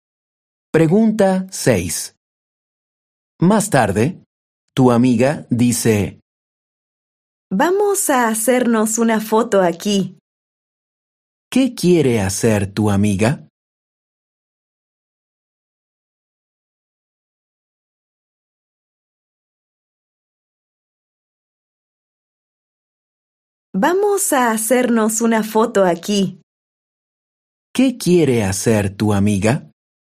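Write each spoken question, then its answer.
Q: ¿Qué quiere hacer tu amiga?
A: hacerse una foto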